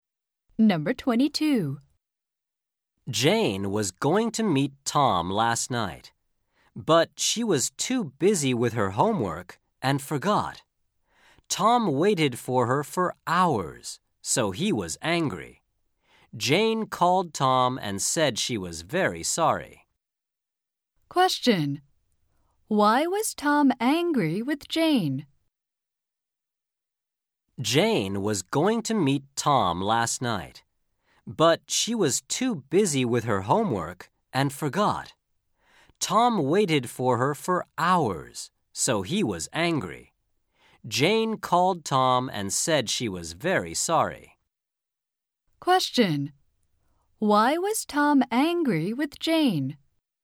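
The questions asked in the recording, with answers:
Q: Why was Tom angry with Jane?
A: Because Jane forgot to meet him and he waited for hours.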